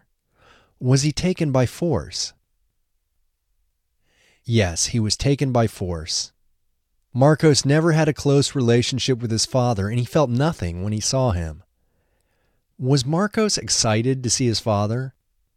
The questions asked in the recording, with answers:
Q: Was Marcos excited to see his father?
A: No, he wasn't excited to see his father.